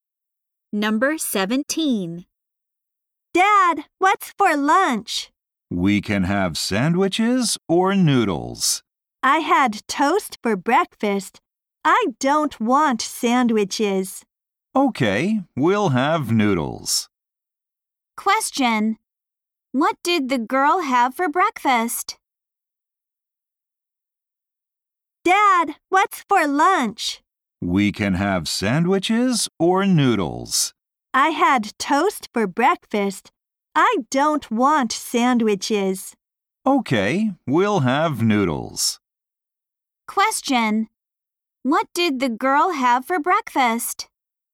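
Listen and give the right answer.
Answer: Toast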